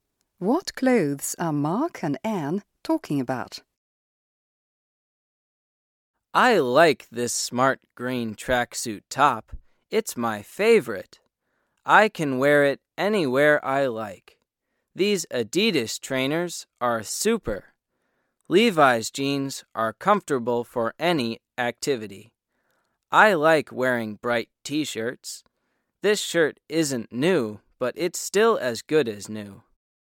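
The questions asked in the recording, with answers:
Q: What clothes are Mark and Anne talking about?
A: A green tracksuit top, Adidas trainers, Levi's jeans and bright T-shirts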